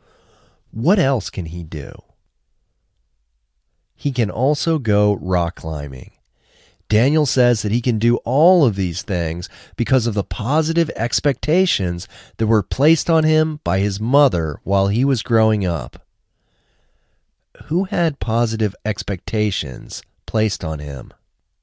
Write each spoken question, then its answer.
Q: Who had positive expectations placed on him?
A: Daniel had positive expectations placed on him.